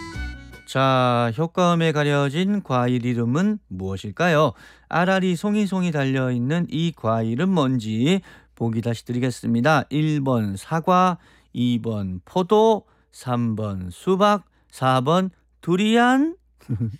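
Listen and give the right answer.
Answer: 2: 포도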